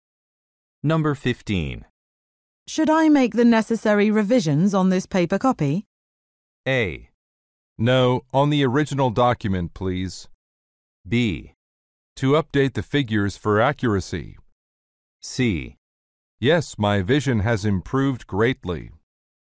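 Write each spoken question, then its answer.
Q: Should I make the necessary revisions on this paper copy?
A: A: No, on the original document, please.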